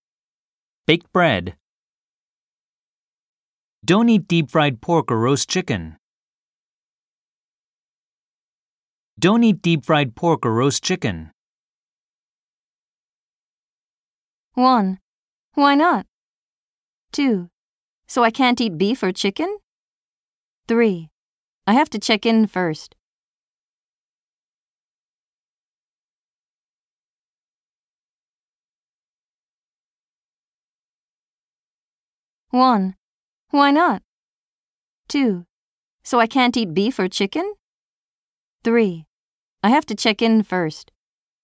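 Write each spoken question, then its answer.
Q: Don't eat deep fried pork or roast chicken.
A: 1: Why not?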